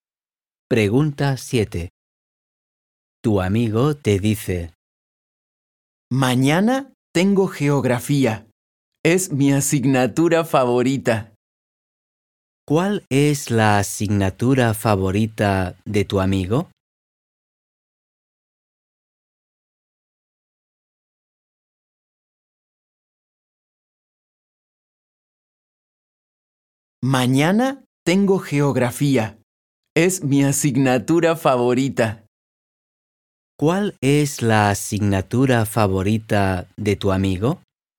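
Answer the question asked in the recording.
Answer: geografía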